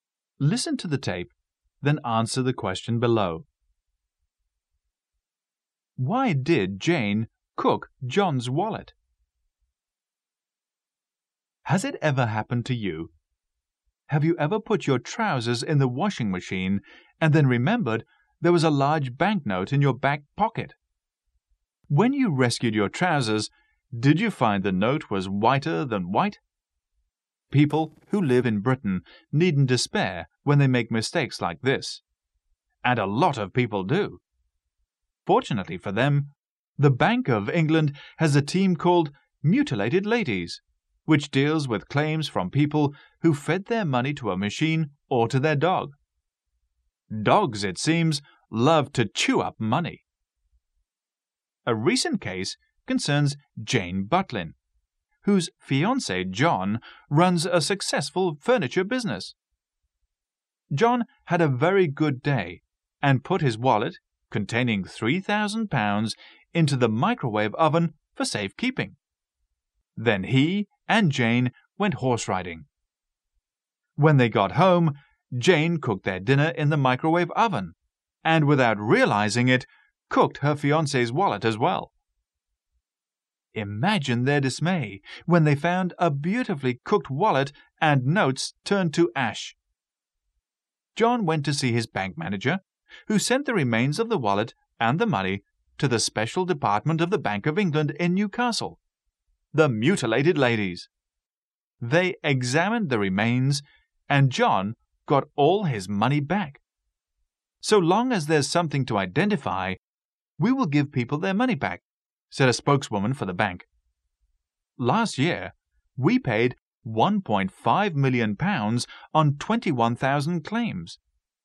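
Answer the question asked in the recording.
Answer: She didn't know it was in the microwave oven, where John had put it for safekeeping.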